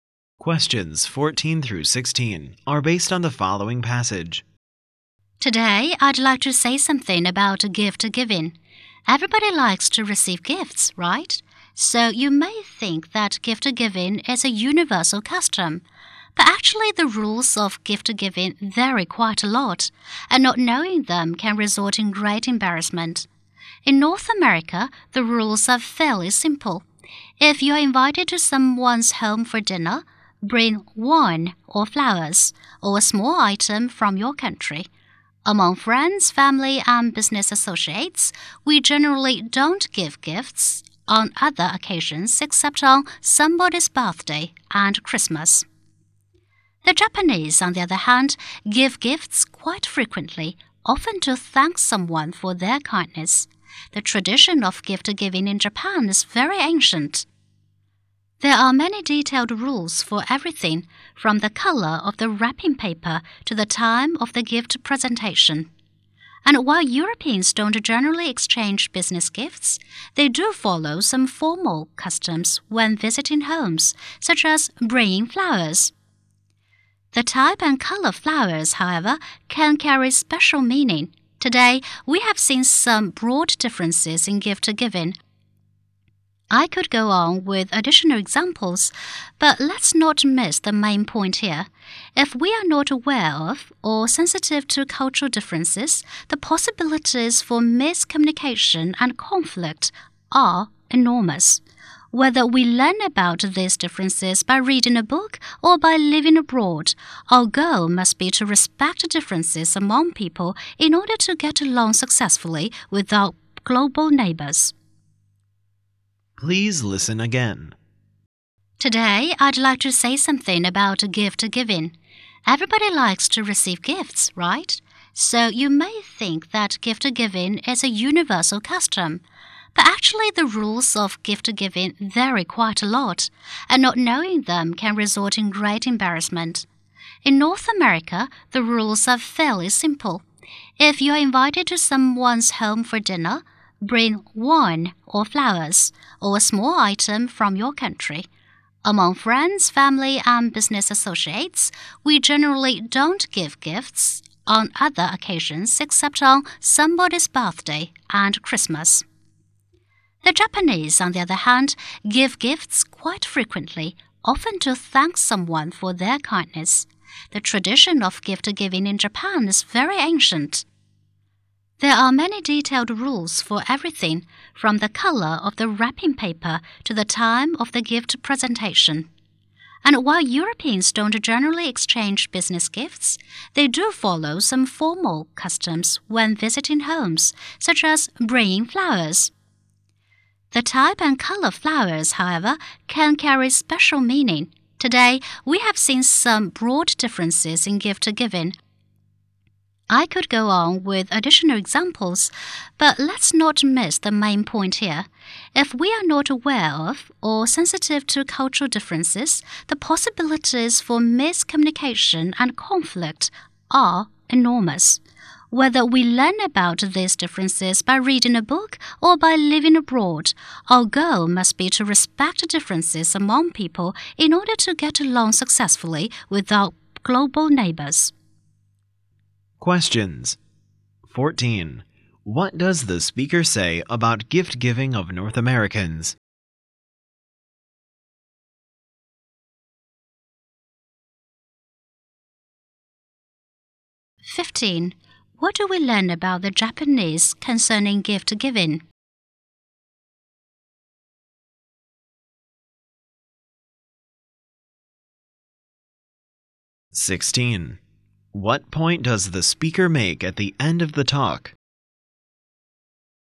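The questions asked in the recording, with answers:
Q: What does the speaker say about gift-giving of North Americans?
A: The rules are fairly simple

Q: What do we learn about the Japanese concerning gift-giving?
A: They give gifts frequently, with ancient traditions and detailed rules

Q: What point does the speaker make at the end of the talk?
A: We should respect cultural differences to get along with others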